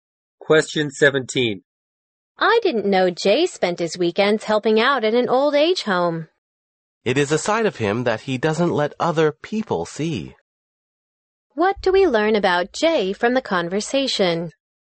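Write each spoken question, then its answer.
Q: What do we learn about Jay from the conversation?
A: He quietly helps at an old age home on weekends, a side he doesn't show others.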